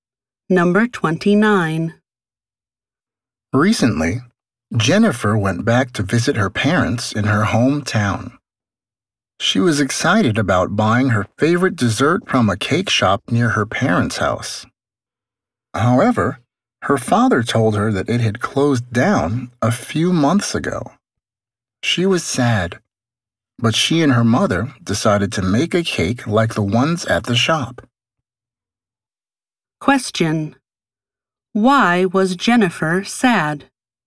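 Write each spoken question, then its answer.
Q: Why was Jennifer sad?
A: The cake shop near her parents' house had closed down.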